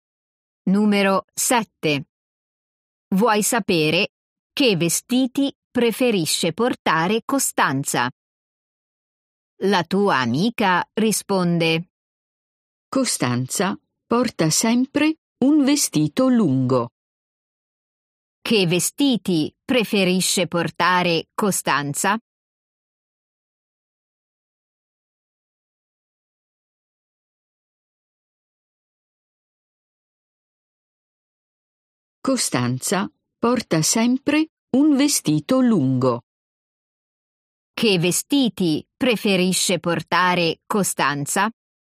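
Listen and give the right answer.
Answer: Un vestito lungo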